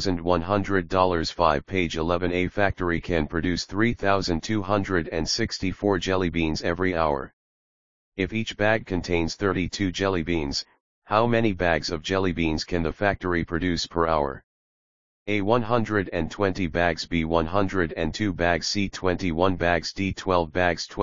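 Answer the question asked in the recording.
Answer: B: 102 bags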